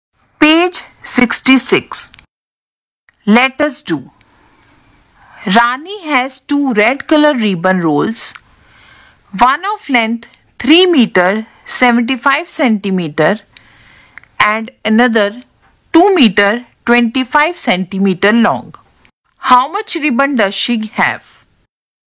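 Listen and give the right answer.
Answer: 6 meters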